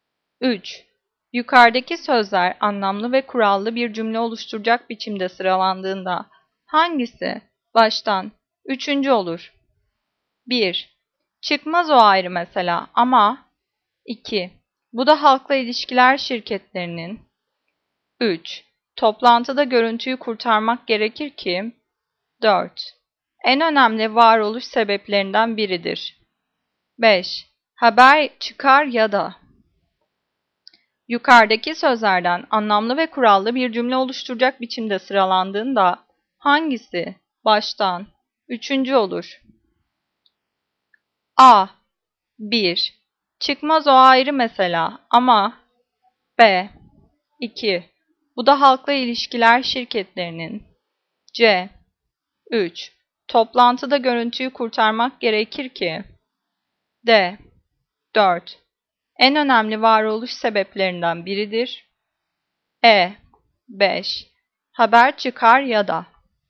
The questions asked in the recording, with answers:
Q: Yukarıdaki sözler anlamlı ve kurallı bir cümle oluşturacak biçimde sıralandığında hangisi baştan üçüncü olur?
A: Cevap C. 3. Toplantıda görüntüyü kurtarmak gerekir ki.